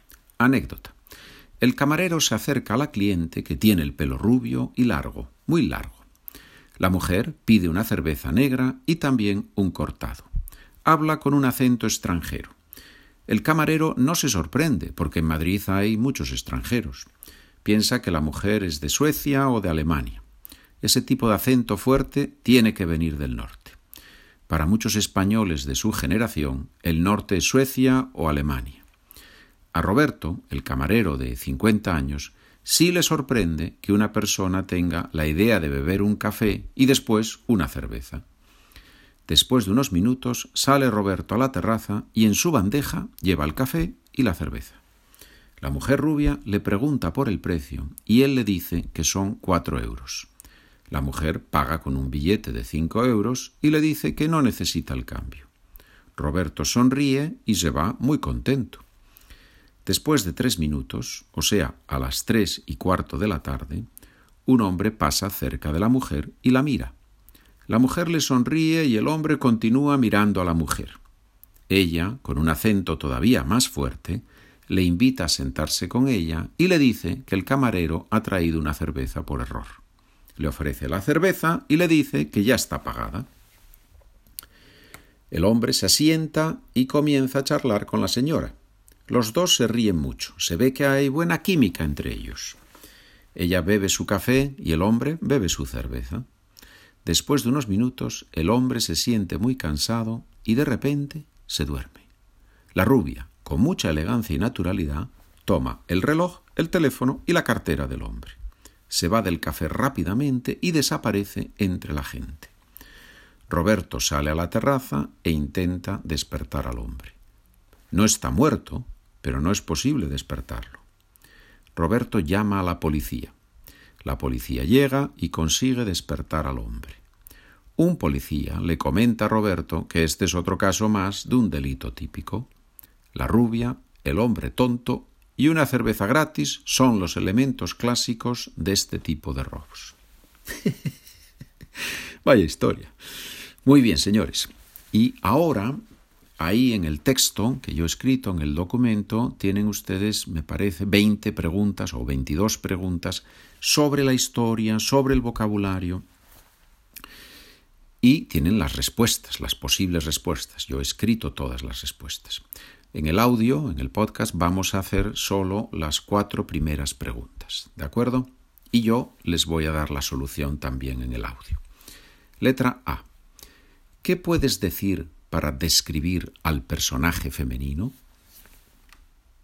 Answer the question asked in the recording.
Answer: Ella es rubia y habla con un acento extranjero.